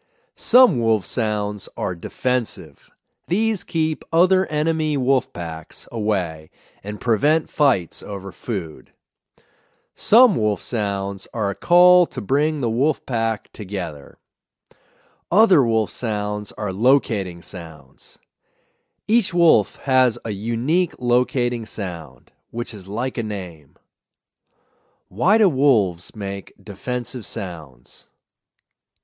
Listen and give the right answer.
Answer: They make defensive sounds to keep other enemy wolf packs away and prevent fights over food.